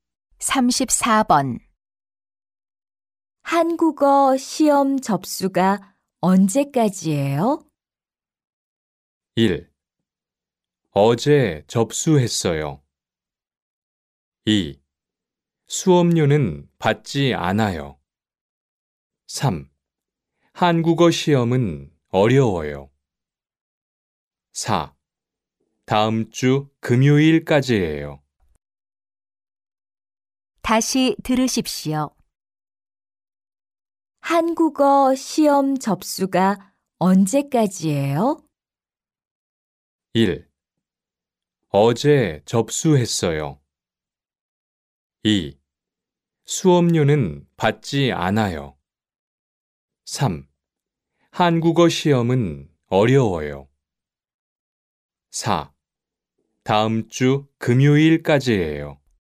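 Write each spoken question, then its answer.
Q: 한국어 시험 접수가 언제까지예요?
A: 4: 다음 주 금요일까지예요.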